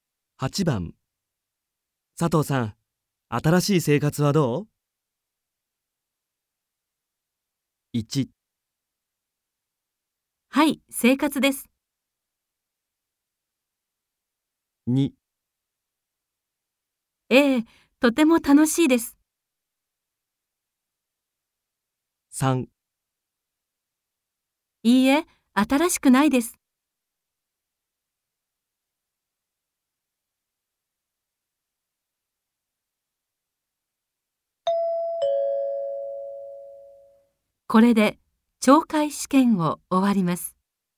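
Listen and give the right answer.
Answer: 2: ええ、とても楽しいです。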